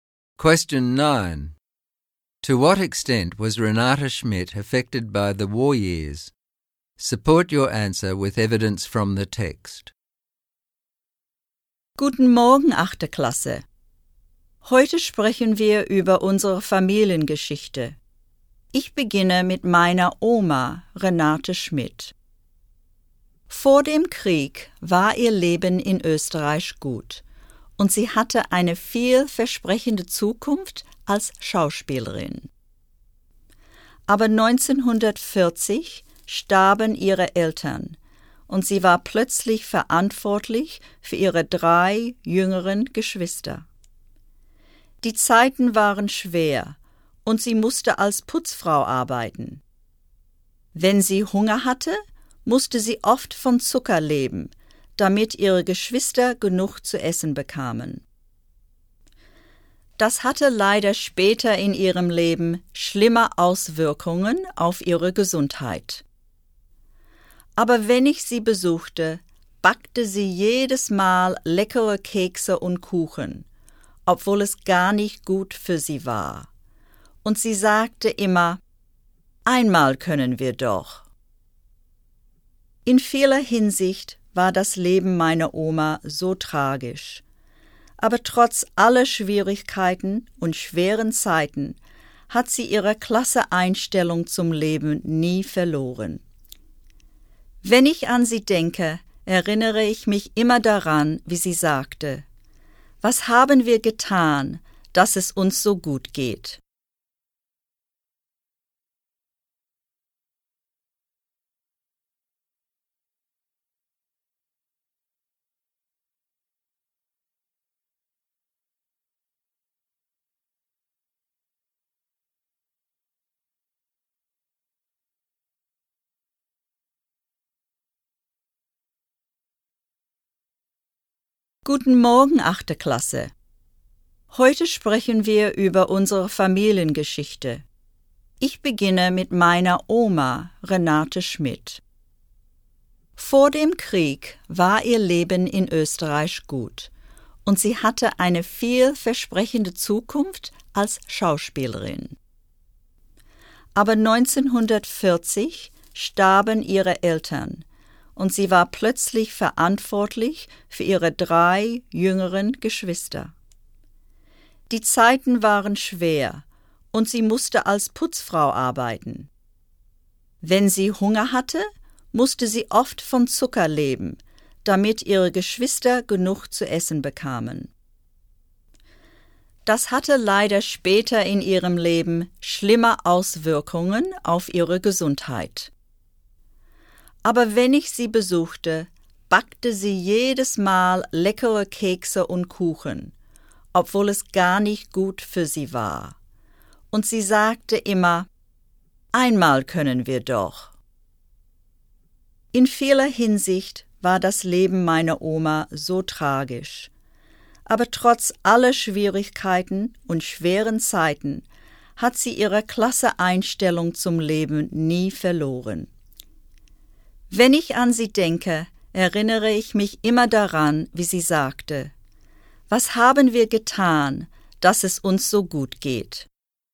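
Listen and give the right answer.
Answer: Greatly. Her parents died in 1940, she lost a promising acting career and had to care for three younger siblings. She worked as a cleaner and often lived on sugar, which later harmed her health. Yet she never lost her positive attitude.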